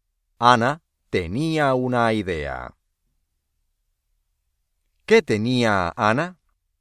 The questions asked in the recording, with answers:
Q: ¿Qué tenía Ana?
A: Una idea.